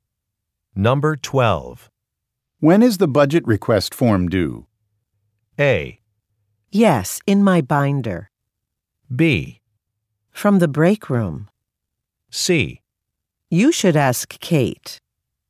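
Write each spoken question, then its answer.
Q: When is the budget request form due?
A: C: You should ask Kate.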